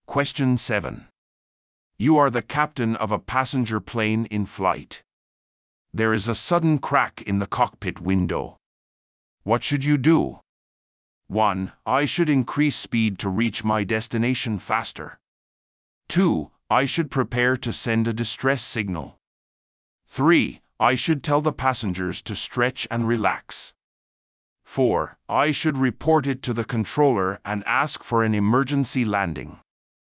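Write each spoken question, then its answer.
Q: What should you do?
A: 4: I should report it to the controller and ask for an emergency landing.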